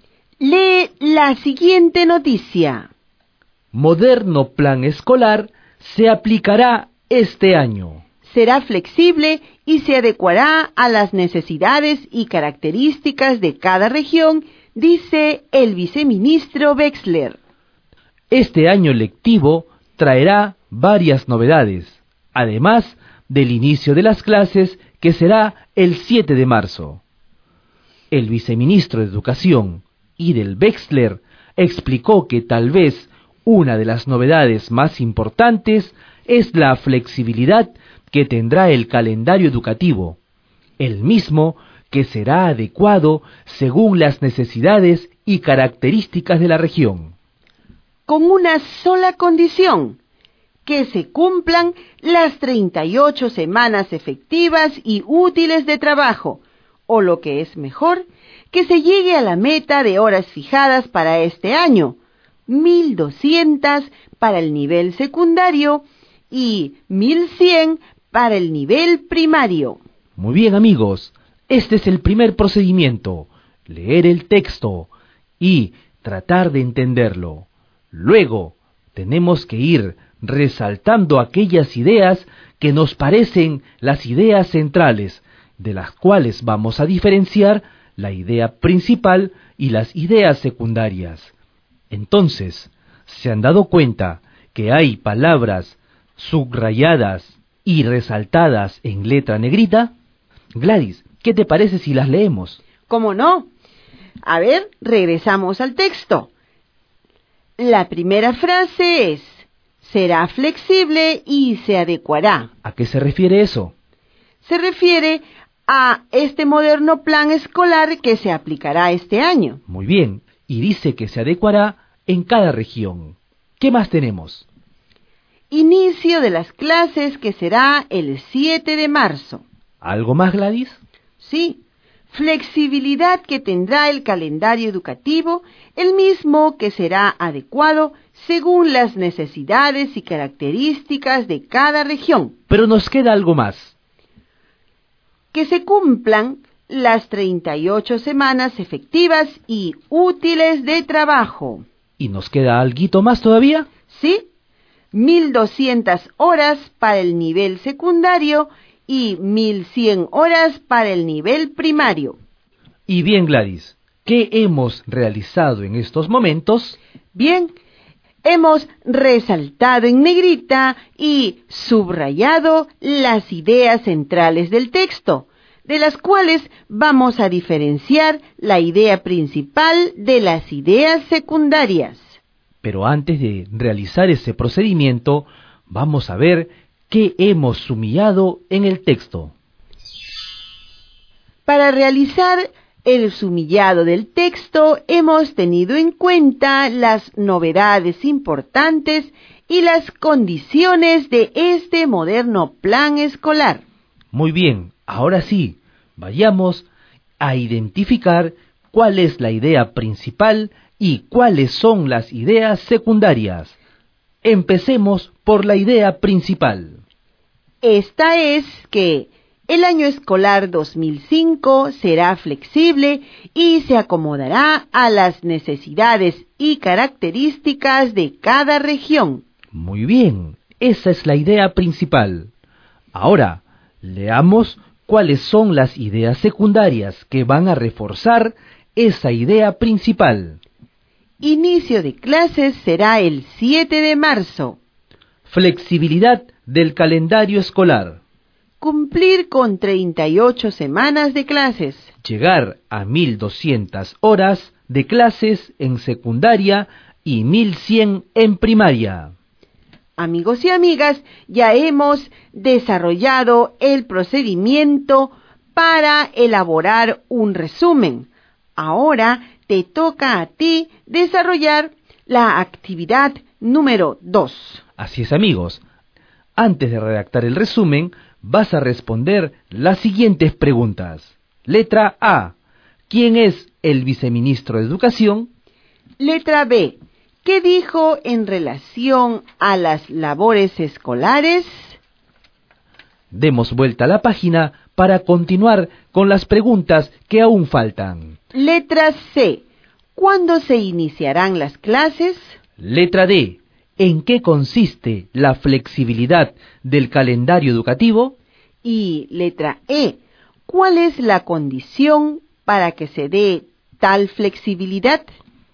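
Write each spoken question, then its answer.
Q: ¿Quién es el viceministro de Educación?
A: Idel Wexler

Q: ¿Cuándo se iniciarán las clases?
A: El 7 de marzo

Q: ¿En qué consiste la flexibilidad del calendario educativo?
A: Se adecuará según las necesidades y características de cada región

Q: ¿Cuál es la condición para que se dé tal flexibilidad?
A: Que se cumplan las 38 semanas efectivas de trabajo (1.200 horas en secundaria y 1.100 en primaria)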